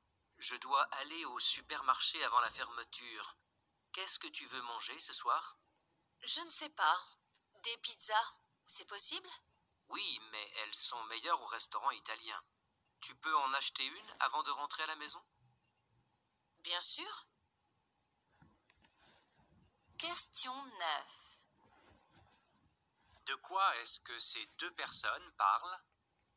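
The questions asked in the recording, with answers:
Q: De quoi est-ce que ces deux personnes parlent?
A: Du repas de ce soir (acheter une pizza)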